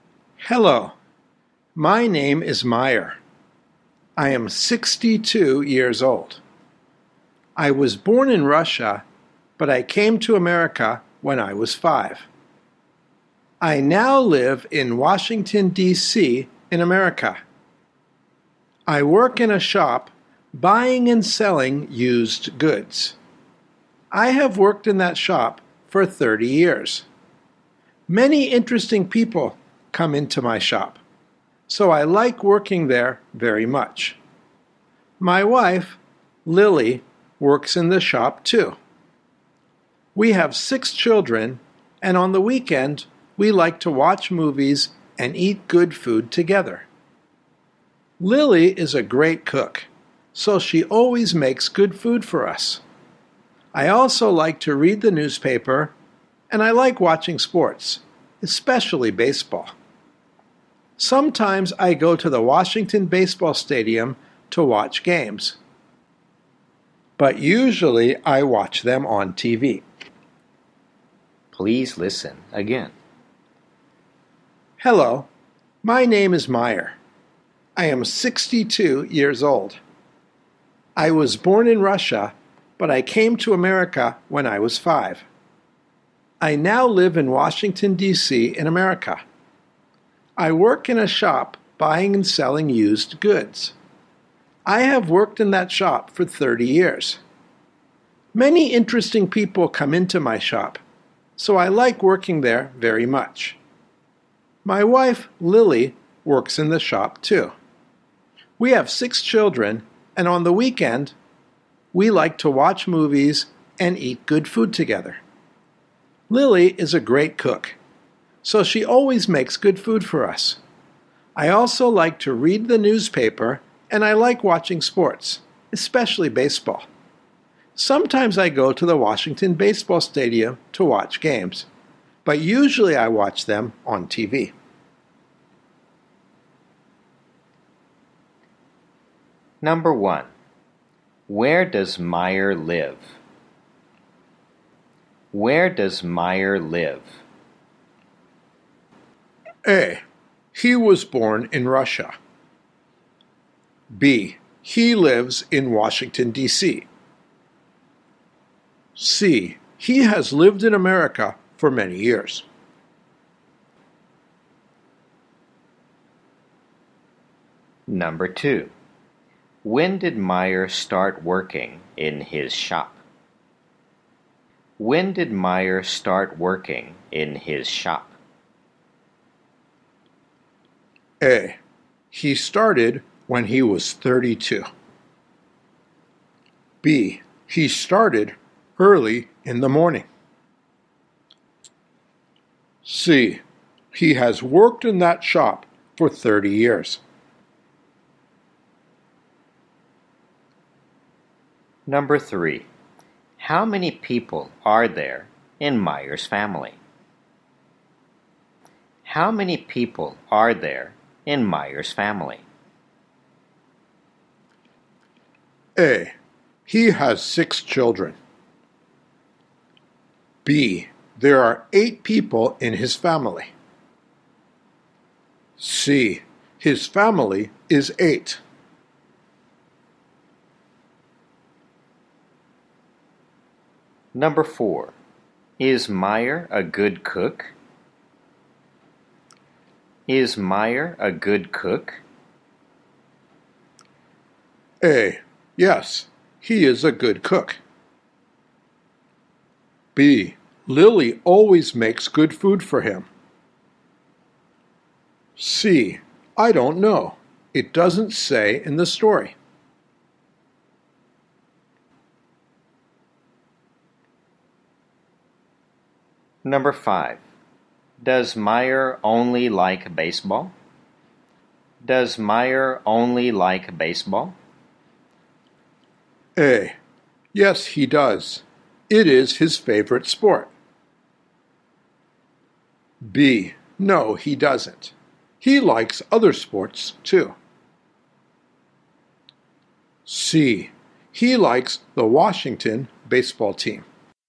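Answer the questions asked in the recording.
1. B: He lives in Washington, D.C.
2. A: He started when he was 32.
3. B: There are 8 people in his family.
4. C: I don't know. It doesn't say in the story.
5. B: No, he doesn't. He likes other sports, too.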